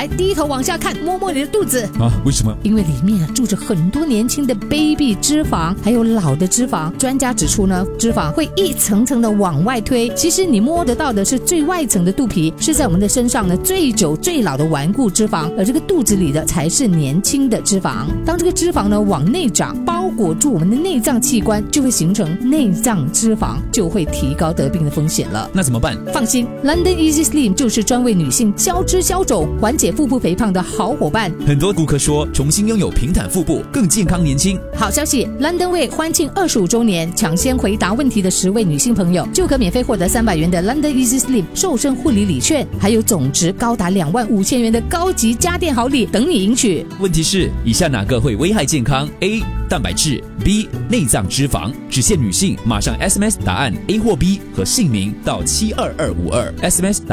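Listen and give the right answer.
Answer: B: 内脏脂肪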